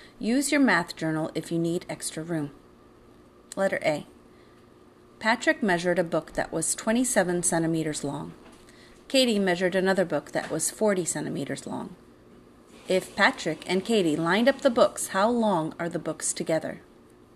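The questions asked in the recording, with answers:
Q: If Patrick and Katie lined up the books, how long are the books together?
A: 67 centimeters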